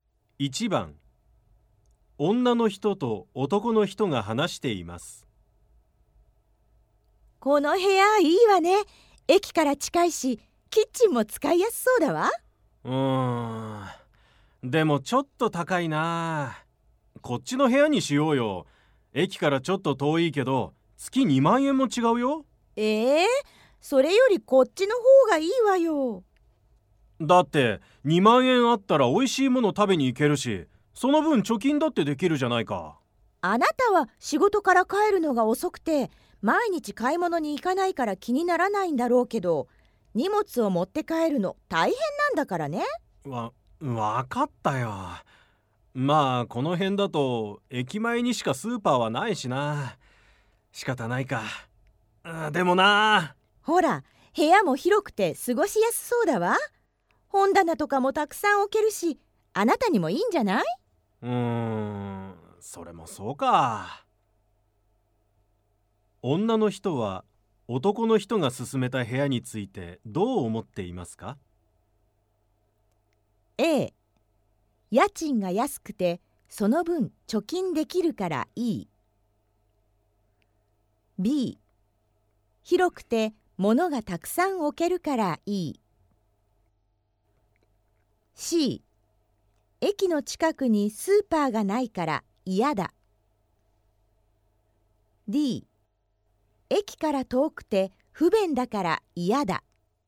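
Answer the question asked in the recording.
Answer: D: 駅から遠くて不便だから嫌だ。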